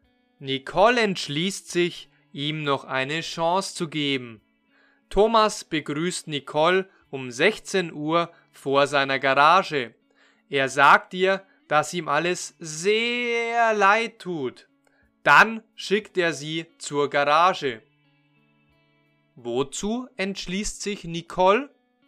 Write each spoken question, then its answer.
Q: Wozu entschließt sich Nicole?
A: Sie entschließt sich, ihm noch eine Chance zu geben.